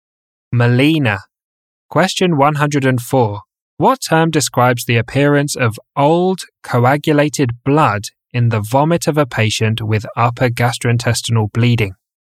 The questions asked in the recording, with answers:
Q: What term describes the appearance of old, coagulated blood in the vomit of a patient with upper gastrointestinal bleeding?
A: Coffee ground vomit.